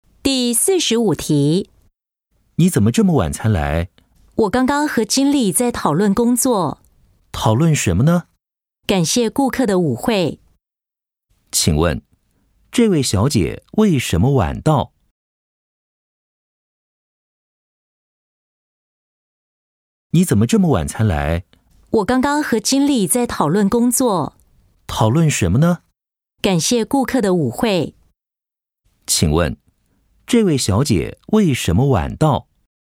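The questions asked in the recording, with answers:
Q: 请问,这位小姐为什么晚到?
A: 她刚刚和经理在讨论工作(感谢顾客的舞会)。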